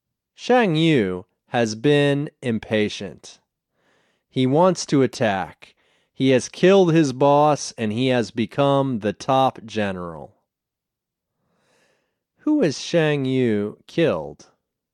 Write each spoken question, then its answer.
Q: Who has Shang Yu killed?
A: He has killed his boss.